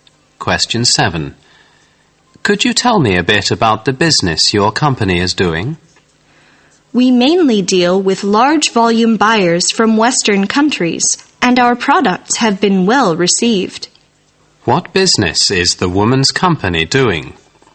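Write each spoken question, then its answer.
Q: What business is the woman's company doing?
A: Selling products in large volumes to buyers from Western countries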